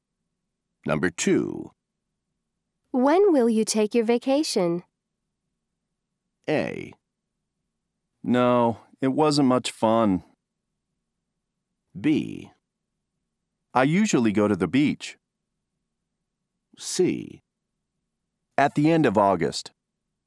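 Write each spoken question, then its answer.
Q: When will you take your vacation?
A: C: At the end of August.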